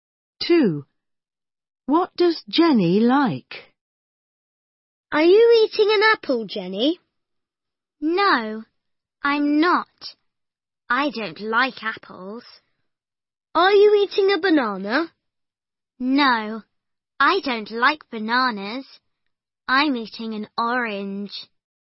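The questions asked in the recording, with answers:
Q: What does Jenny like?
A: Oranges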